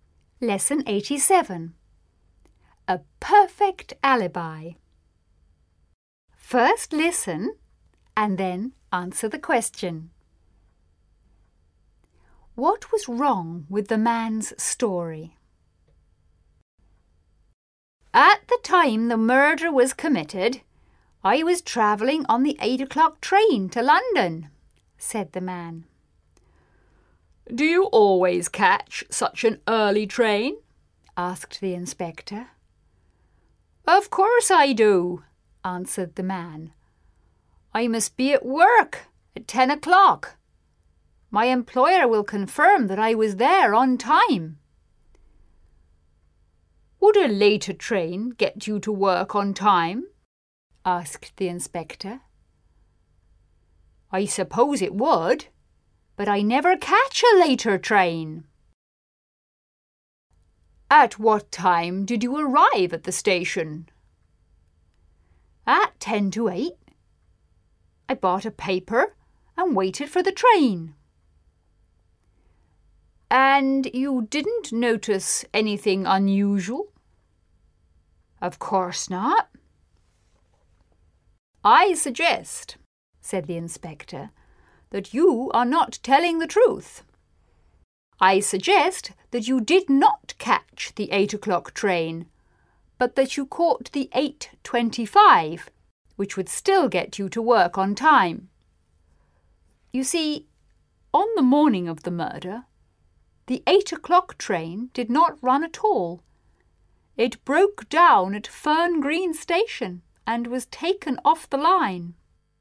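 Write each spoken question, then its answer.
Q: What was wrong with the man's story?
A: He said he caught the 8 o'clock train, but that train did not run that morning because it broke down at Fern Green Station.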